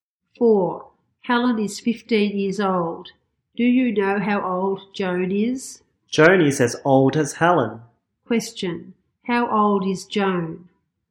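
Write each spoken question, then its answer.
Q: How old is Joan?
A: 15 years old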